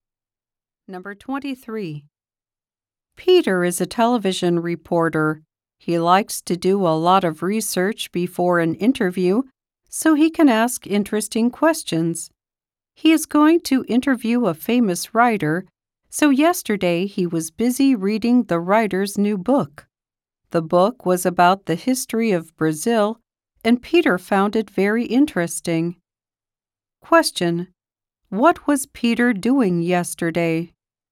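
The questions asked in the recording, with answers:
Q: What was Peter doing yesterday?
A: Reading a writer's new book.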